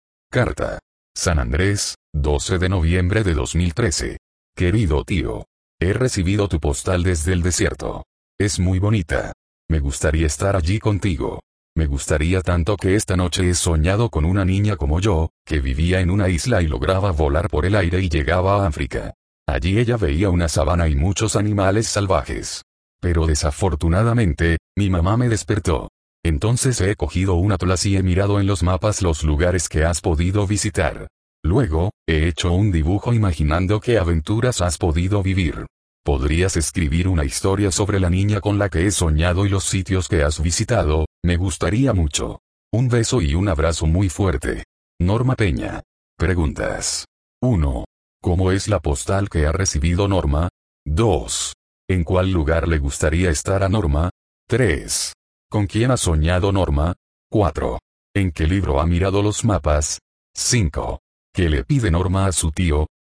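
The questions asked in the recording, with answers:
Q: ¿Cómo es la postal que ha recibido Norma?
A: Es muy bonita

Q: ¿En cuál lugar le gustaría estar a Norma?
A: En el desierto, con su tío

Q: ¿Con quién ha soñado Norma?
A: Con una niña como ella que vivía en una isla

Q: ¿En qué libro ha mirado los mapas?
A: En un atlas

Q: ¿Qué le pide Norma a su tío,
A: Que escriba una historia sobre la niña con la que soñó y los sitios que ha visitado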